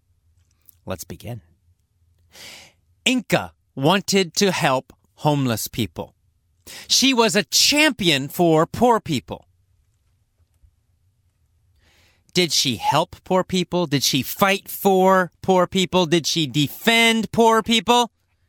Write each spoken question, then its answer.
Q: Did she help poor people?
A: Yes, that's right. She was a champion for poor people.